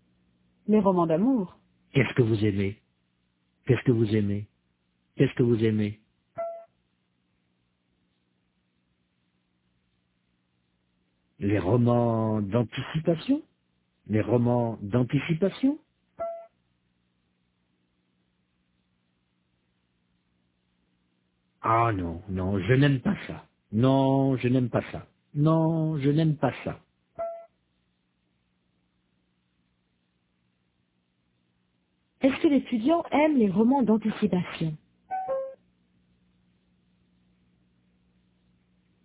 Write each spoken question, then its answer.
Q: Est-ce que l'étudiant aime les romans d'anticipation?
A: Non, il n'aime pas ça.